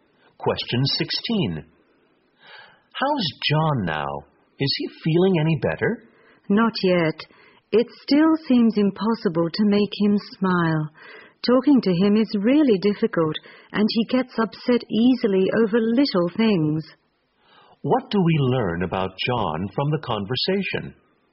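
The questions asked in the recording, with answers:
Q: What do we learn about John from the conversation?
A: He is still depressed and gets upset easily.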